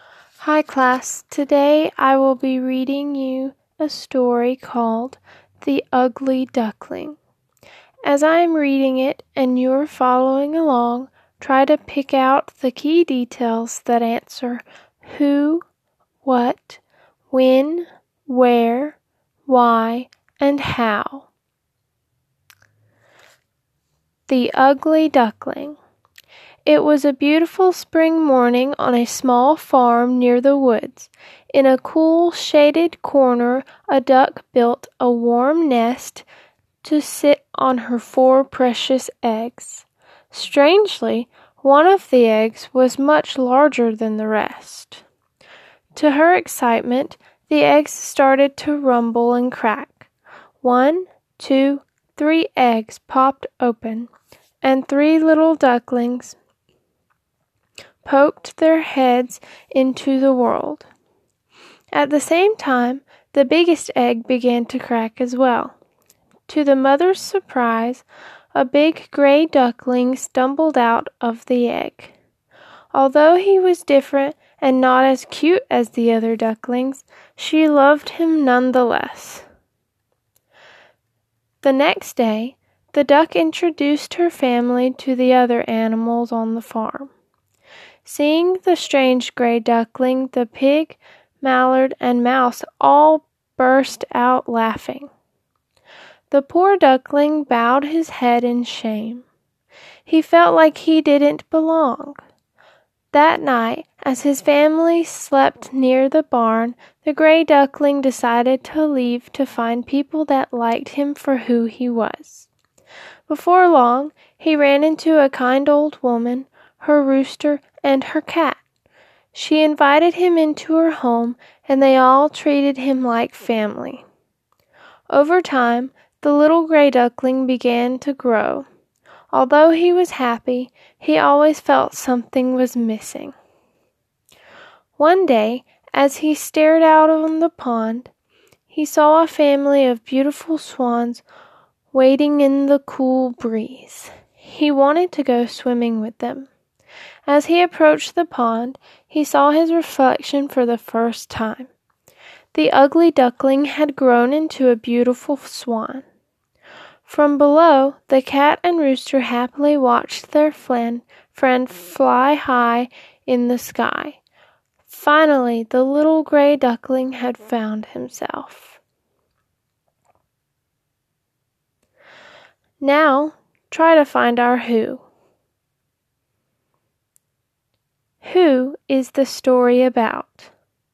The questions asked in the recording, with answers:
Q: Who is the story about?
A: The story is about the gray duckling.